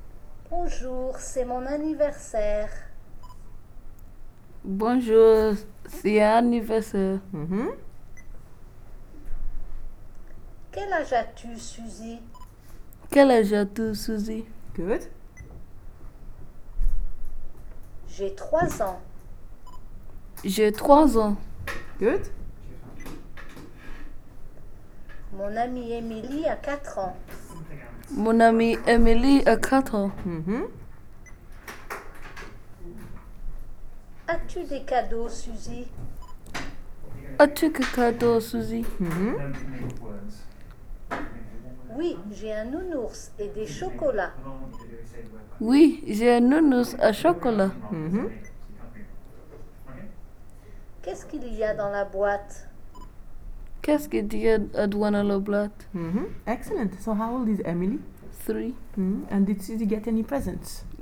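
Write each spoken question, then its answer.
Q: And did Suzy get any presents?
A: Yes, a teddy bear and chocolates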